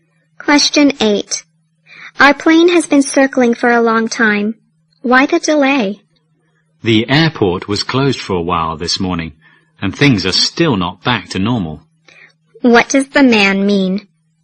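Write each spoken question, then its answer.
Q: What does the man mean?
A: The airport was closed for a while and things aren't back to normal yet.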